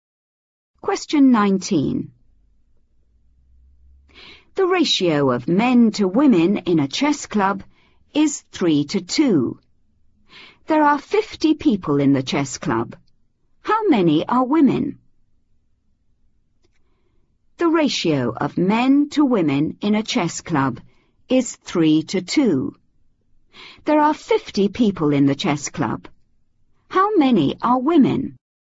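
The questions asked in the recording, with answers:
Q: How many are women?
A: 20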